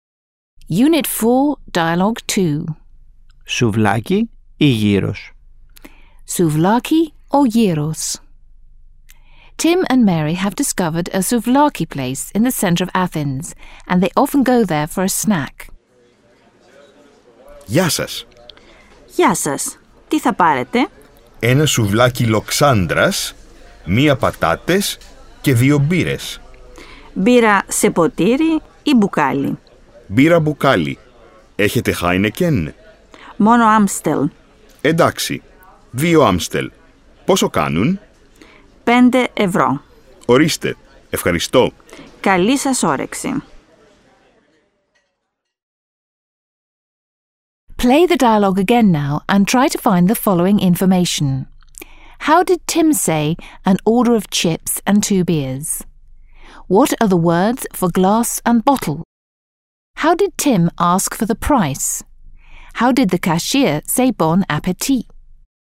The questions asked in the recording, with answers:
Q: How did Tim say an order of chips and two beers?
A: Μία πατάτες και δύο μπύρες

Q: What are the words for glass and bottle?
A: ποτήρι

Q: How did Tim ask for the price?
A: Πόσο κάνουν

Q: How did the cashier say bon appétit?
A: καλή σας όρεξη